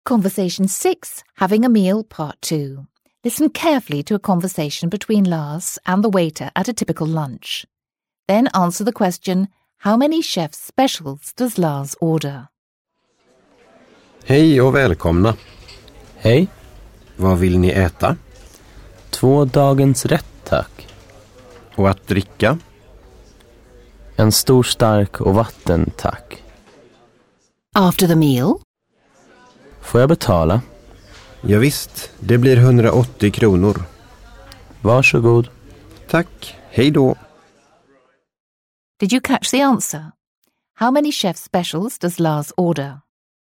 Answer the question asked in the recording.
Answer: That's right, Lars ordered two chef specials.